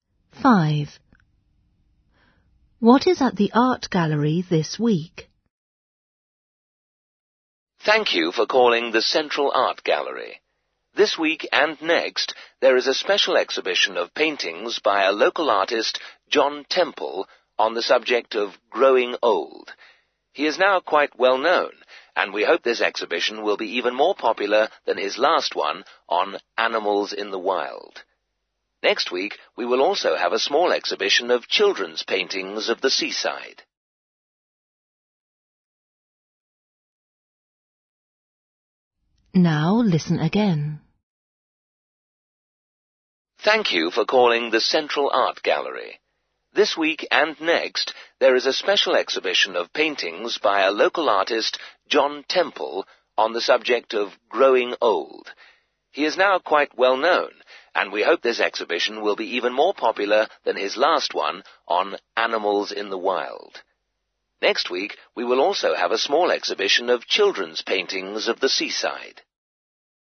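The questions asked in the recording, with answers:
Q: What is at the art gallery this week?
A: paintings of old people (growing old) by John Temple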